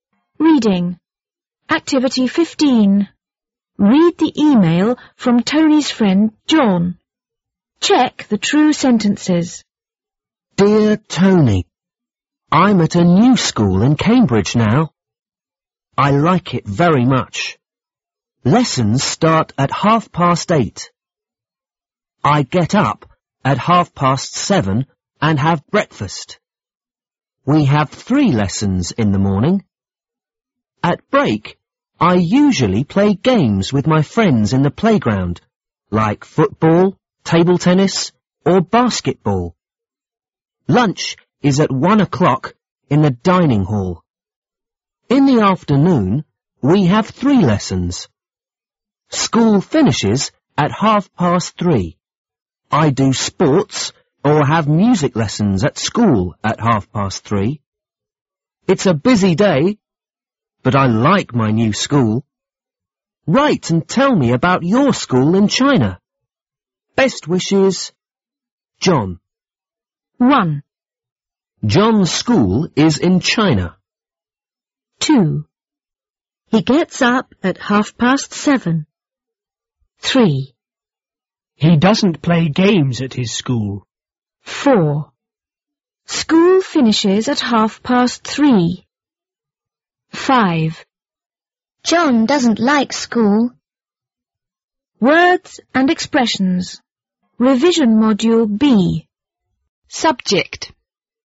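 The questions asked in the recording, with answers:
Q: John's school is in China.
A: False

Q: He gets up at 7:30.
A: True

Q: He doesn't play games at his school.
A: False

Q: School finishes at 3:30.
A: True

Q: John doesn't like school.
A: False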